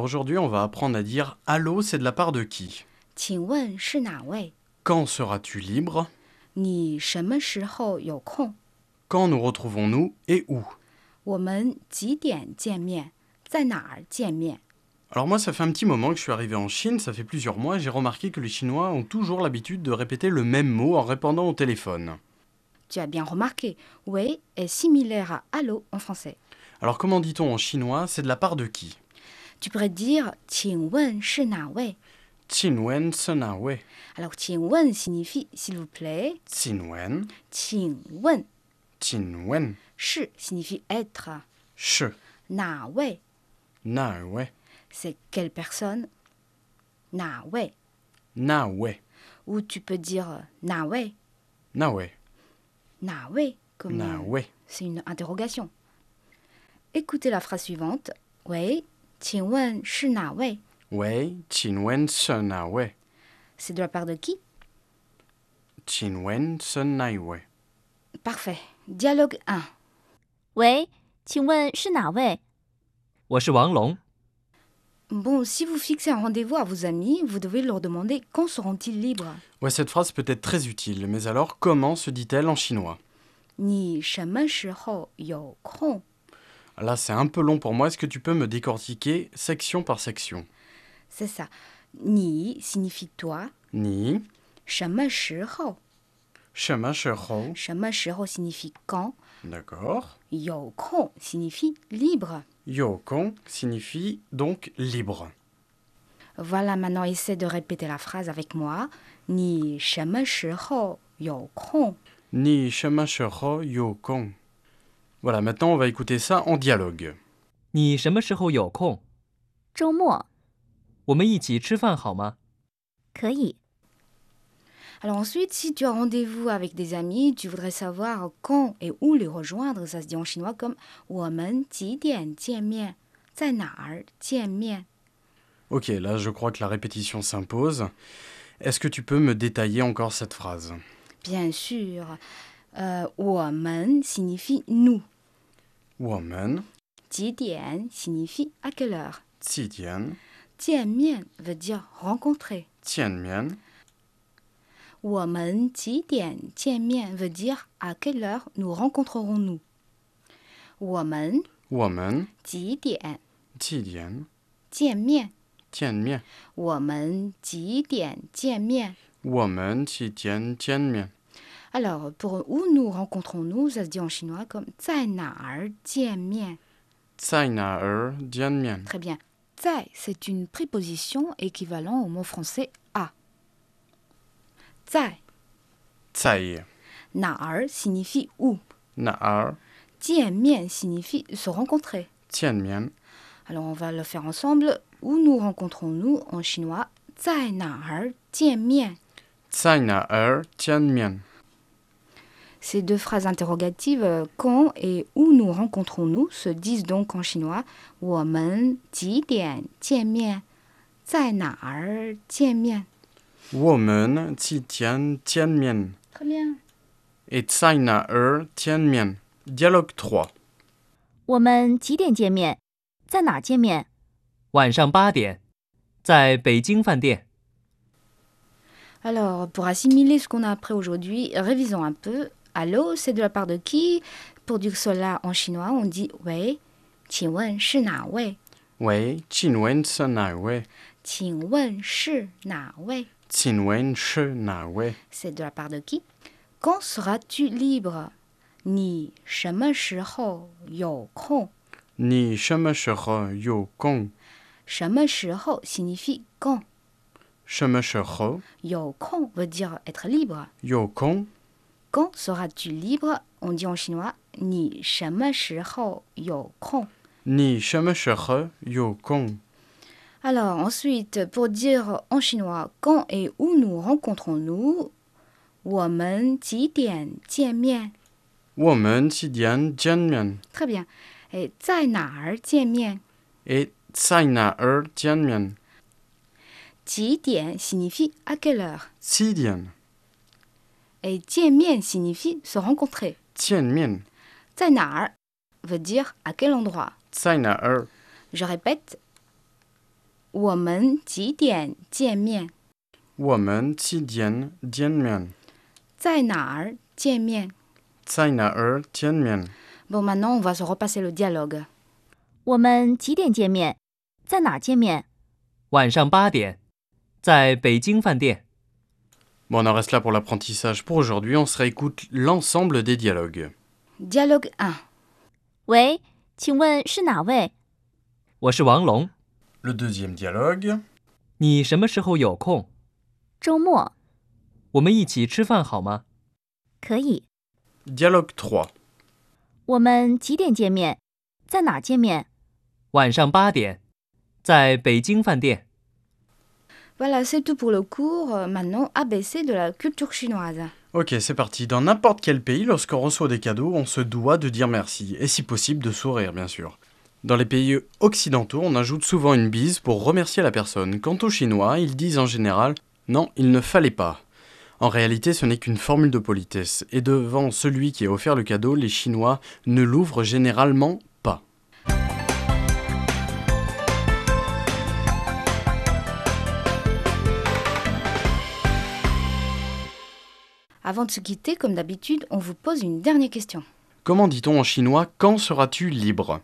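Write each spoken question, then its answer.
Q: Comment dit-on en chinois « quand seras-tu libre »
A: 你什么时候有空?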